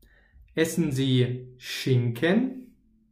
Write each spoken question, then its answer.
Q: Essen sie Schinken?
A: Nein, sondern